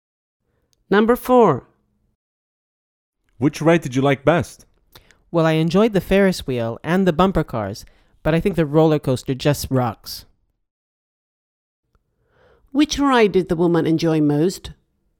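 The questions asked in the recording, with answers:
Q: Which ride did the woman enjoy most?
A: the roller coaster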